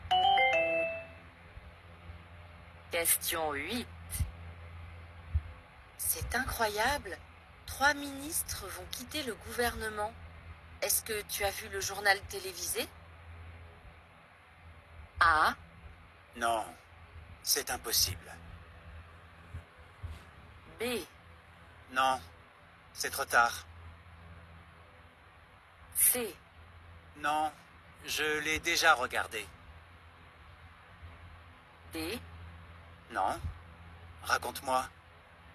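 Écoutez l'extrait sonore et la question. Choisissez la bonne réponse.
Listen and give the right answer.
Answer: Non, raconte-moi.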